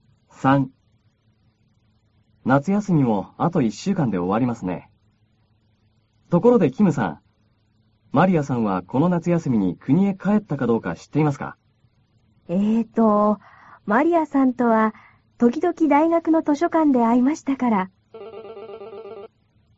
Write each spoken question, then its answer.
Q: マリアさんはこの夏休みに国へ帰ったかどうか知っていますか?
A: 国へは帰らなかったようですよ。